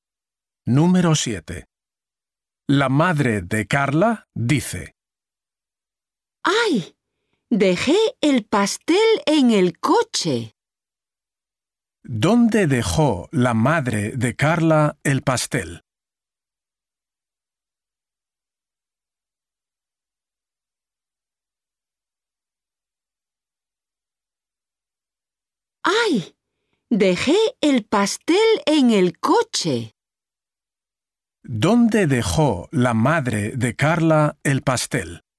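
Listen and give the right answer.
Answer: En el coche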